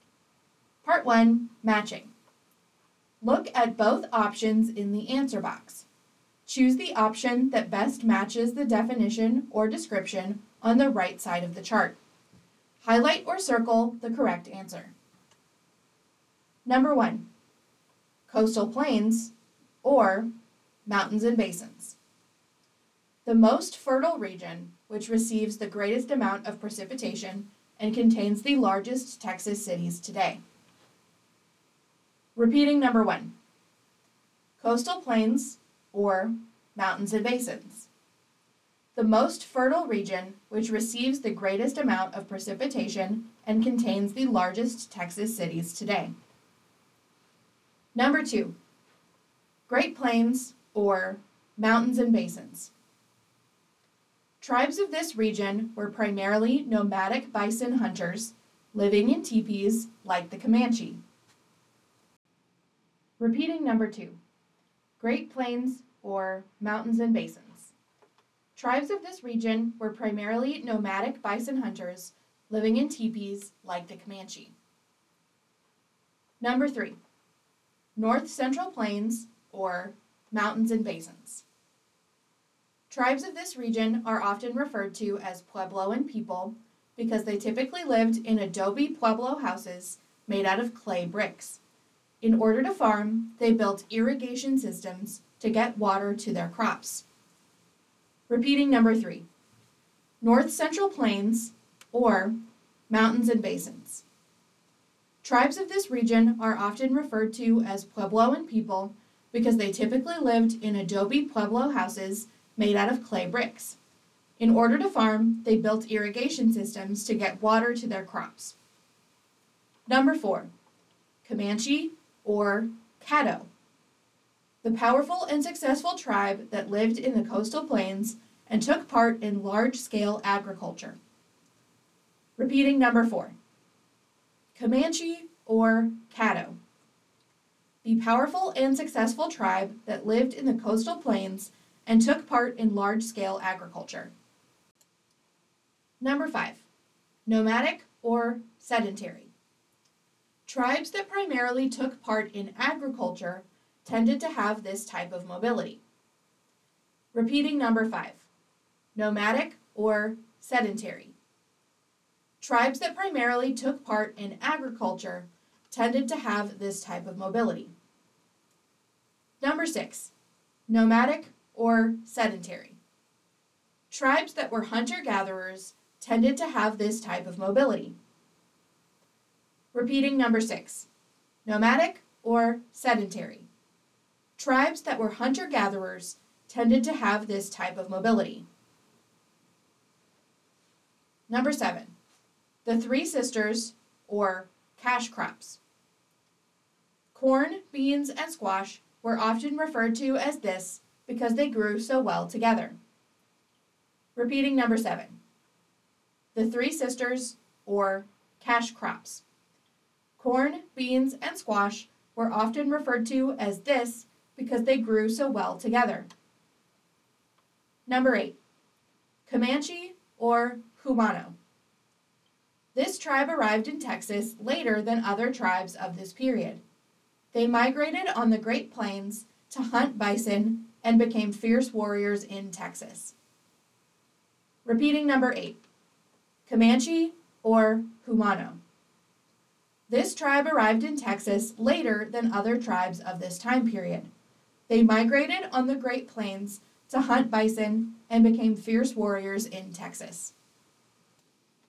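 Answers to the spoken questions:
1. coastal plains
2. Great Plains
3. mountains and basins
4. Caddo
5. sedentary
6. nomadic
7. the Three Sisters
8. Comanche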